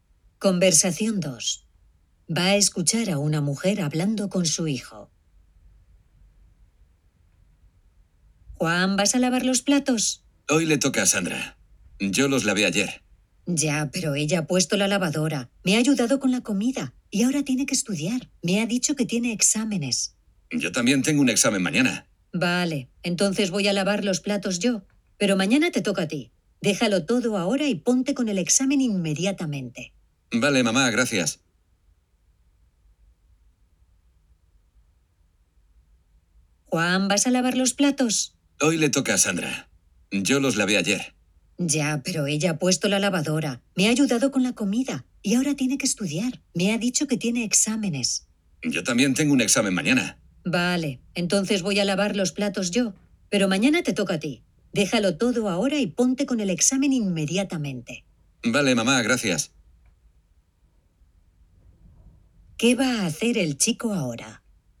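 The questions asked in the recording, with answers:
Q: ¿Qué va a hacer el chico ahora?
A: Estudiar para el examen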